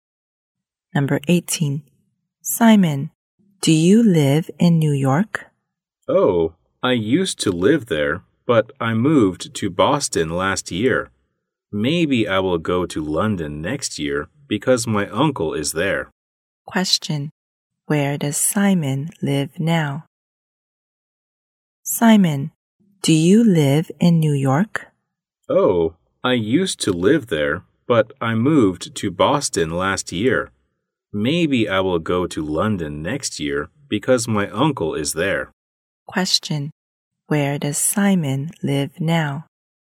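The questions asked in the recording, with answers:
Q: Where does Simon live now?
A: Boston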